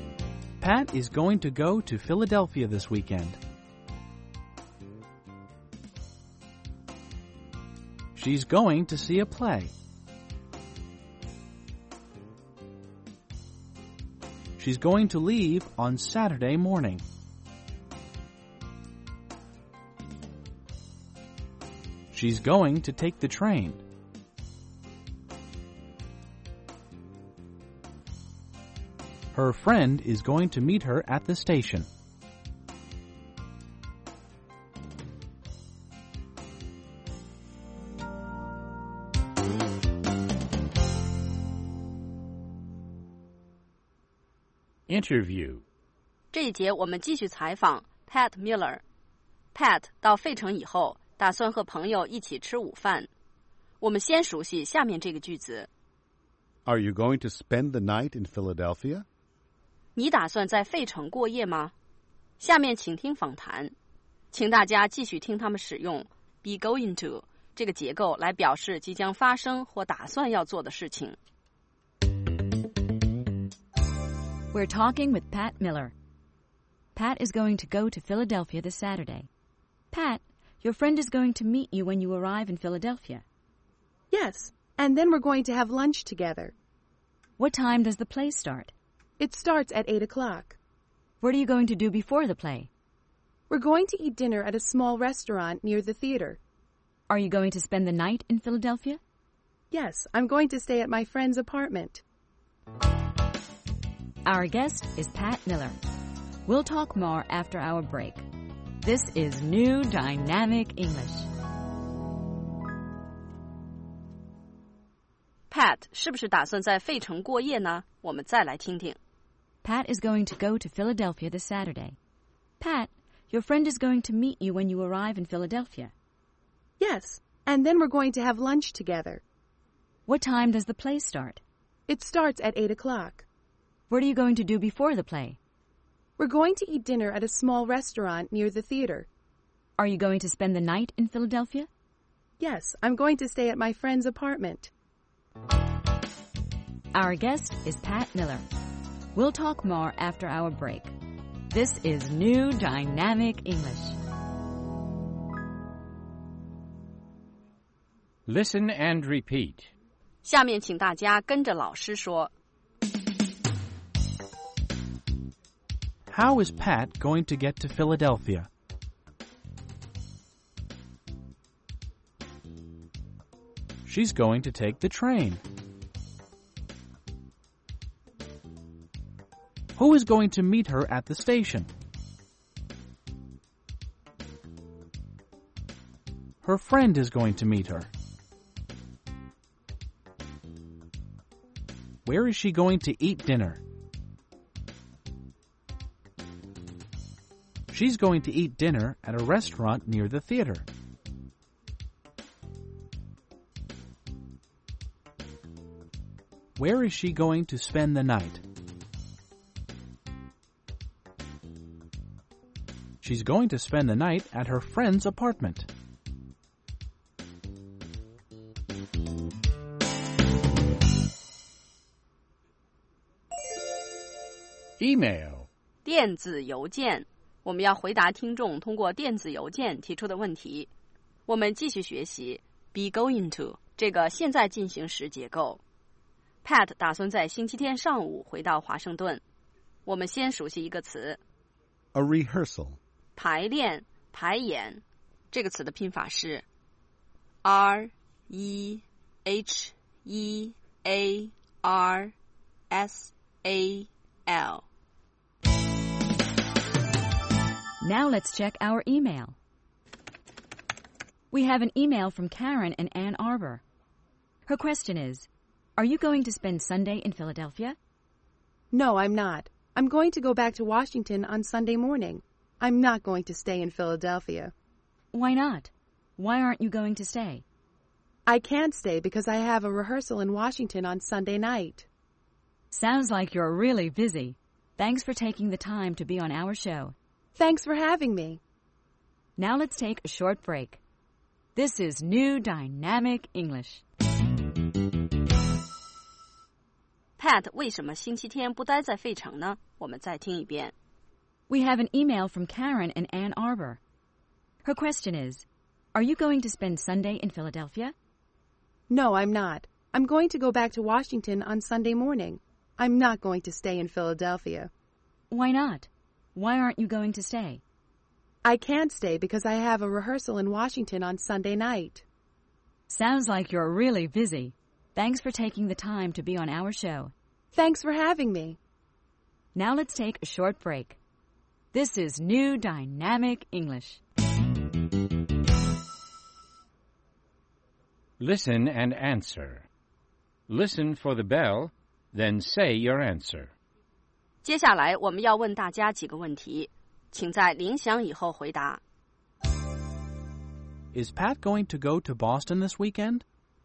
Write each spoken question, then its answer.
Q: Is Pat going to go to Boston this weekend?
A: No, she isn't. She isn't going to go to Boston.